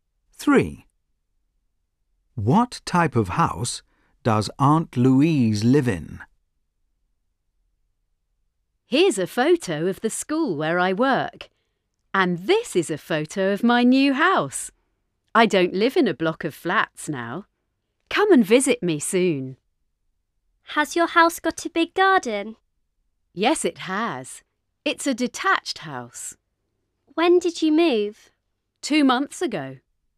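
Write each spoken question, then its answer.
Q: What type of house does Aunt Louise live in?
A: a detached house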